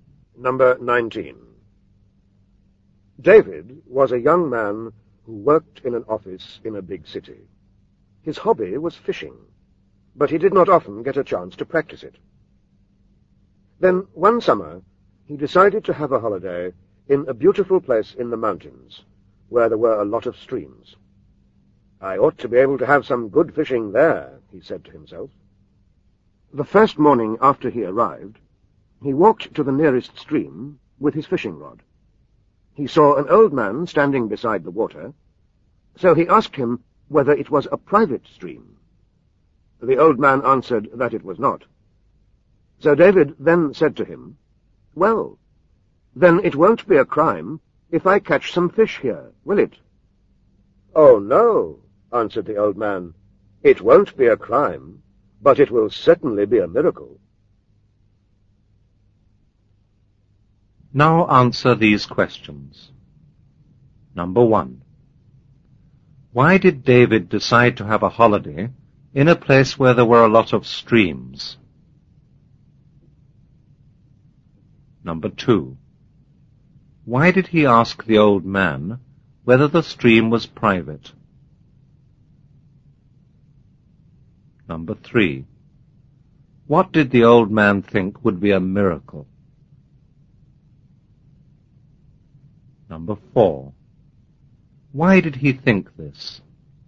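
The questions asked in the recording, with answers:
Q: Why did David decide to have a holiday in a place where there were a lot of streams?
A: Because his hobby was fishing and he wanted some good fishing

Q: Why did he ask the old man whether the stream was private?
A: Because he wanted to know whether he was allowed to fish there

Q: What did the old man think would be a miracle?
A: David catching some fish there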